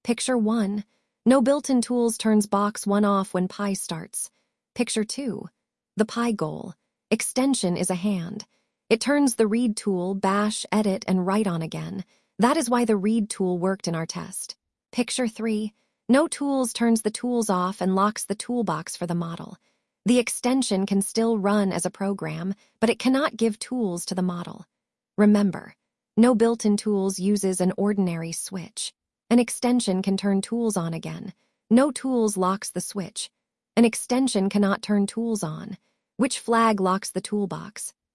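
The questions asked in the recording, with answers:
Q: Which flag locks the toolbox?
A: No tools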